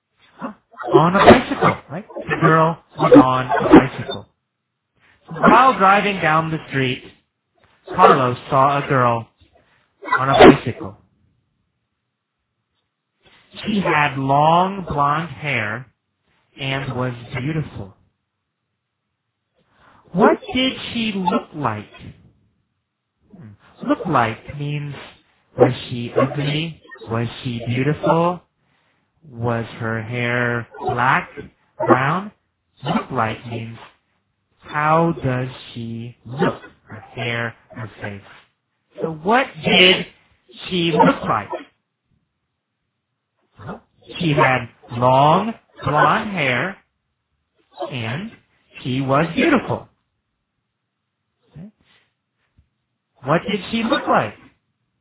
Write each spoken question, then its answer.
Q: What did she look like?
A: She had long blonde hair and she was beautiful.